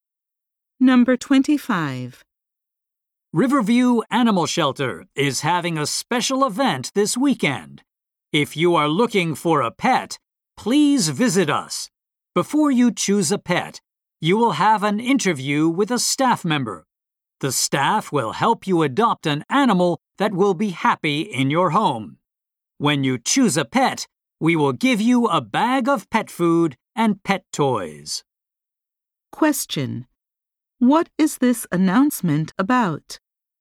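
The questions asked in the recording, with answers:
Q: What is this announcement about?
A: A special pet adoption event at an animal shelter.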